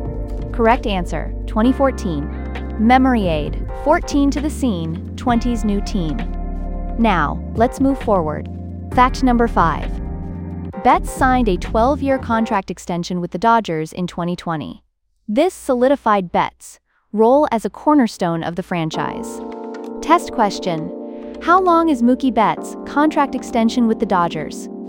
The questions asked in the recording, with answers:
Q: How long is Mookie Betts' contract extension with the Dodgers?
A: Correct answer, 12 years.